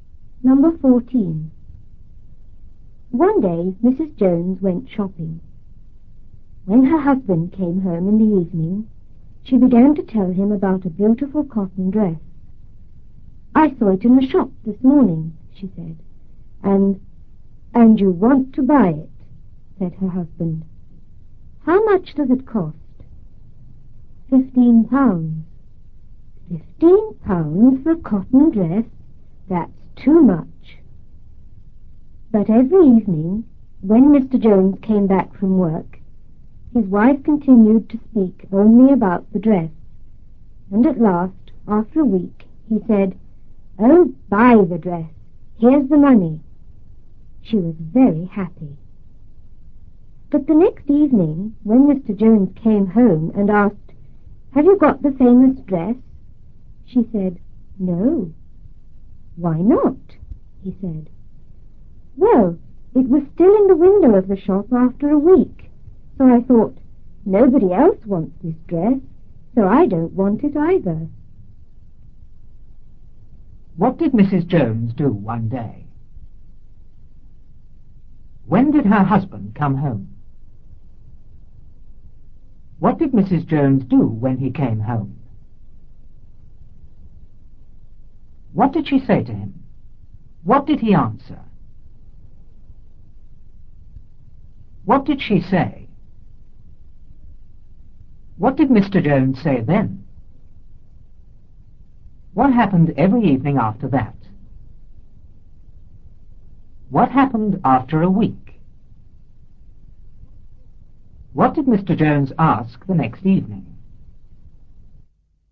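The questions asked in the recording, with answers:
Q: What did Mrs. Jones do one day?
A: She went shopping.

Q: When did her husband come home?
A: In the evening.

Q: What did Mrs. Jones do when he came home?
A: She began to tell him about a beautiful cotton dress.

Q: What did she say to him?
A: "I saw it in the shop this morning."

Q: What did he answer?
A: "And you want to buy it. How much does it cost?"

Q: What did she say?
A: £15.

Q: What did Mr. Jones say then?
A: £15 for a cotton dress? That's too much.

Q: What happened every evening after that?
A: His wife kept talking only about the dress.

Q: What happened after a week?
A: He told her to buy the dress and gave her the money.

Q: What did Mr. Jones ask the next evening?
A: "Have you got the famous dress?"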